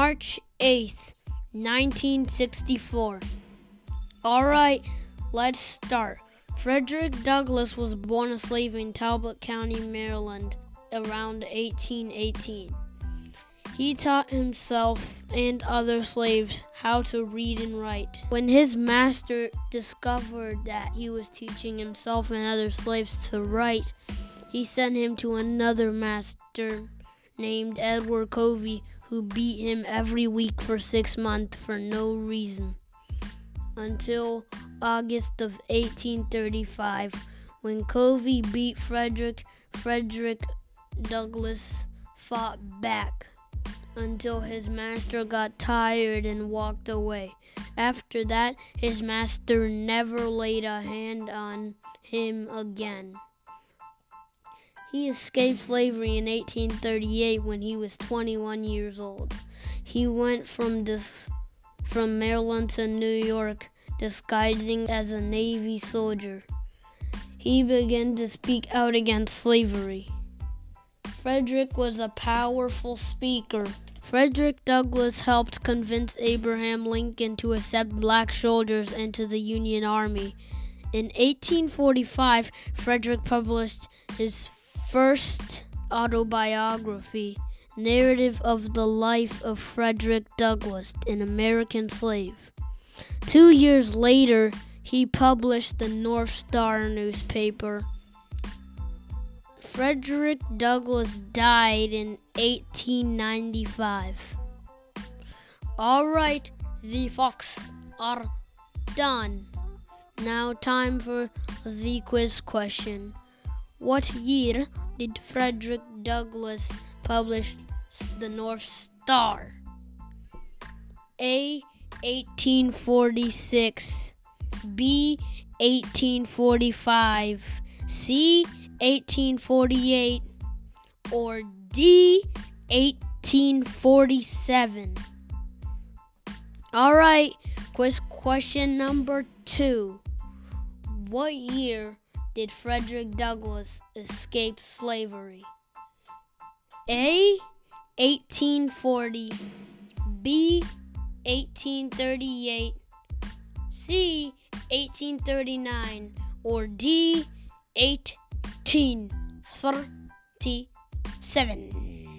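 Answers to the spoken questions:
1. D: 1847
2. B: 1838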